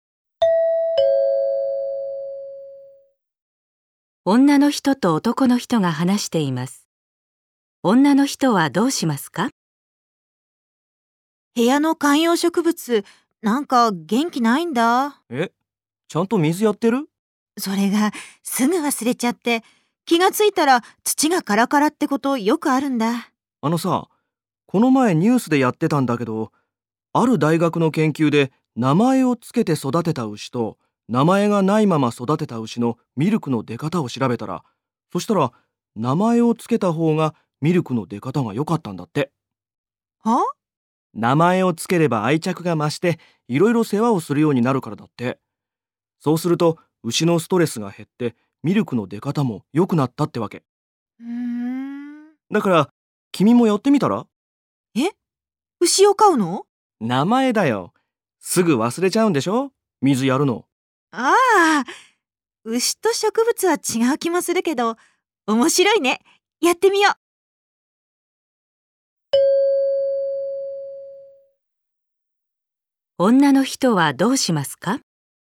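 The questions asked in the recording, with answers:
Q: 女の人はどうしますか?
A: 観葉植物に名前をつける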